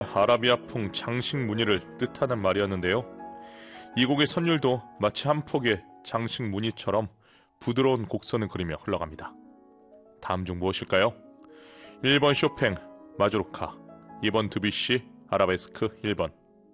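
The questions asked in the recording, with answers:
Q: 다음 중 무엇일까요? 1번 쇼팽, 마주로카, 2번 드뷔시, 아라베스크 1번.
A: 2: 드뷔시, 아라베스크 1번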